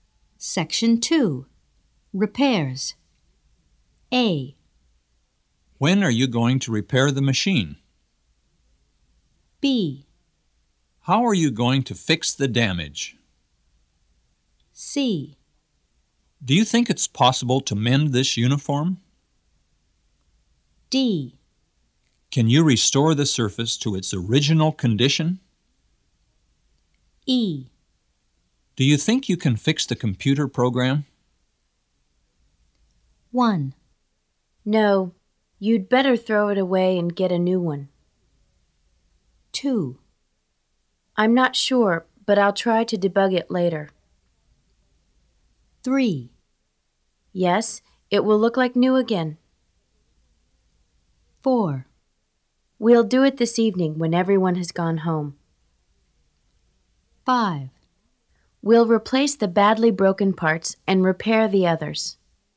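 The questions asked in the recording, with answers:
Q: No, you'd better throw it away and get a new one.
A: C: Do you think it's possible to mend this uniform?

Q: I'm not sure, but I'll try to debug it later.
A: E: Do you think you can fix the computer program?

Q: Yes, it will look like new again.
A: D: Can you restore the surface to its original condition?

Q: We'll do it this evening when everyone has gone home.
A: A: When are you going to repair the machine?

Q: We'll replace the badly broken parts and repair the others.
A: B: How are you going to fix the damage?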